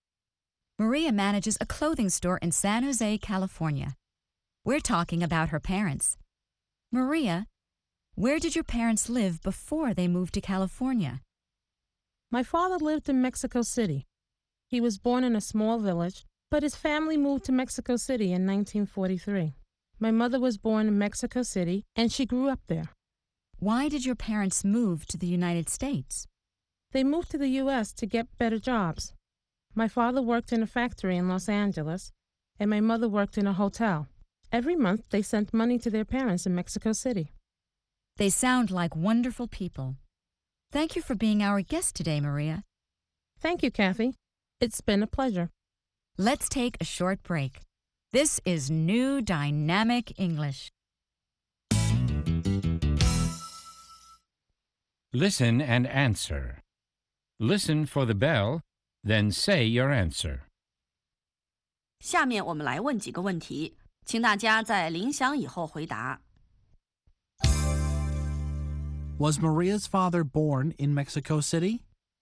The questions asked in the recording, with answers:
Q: Was Maria's father born in Mexico City?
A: No, he wasn't. He was born in a small village.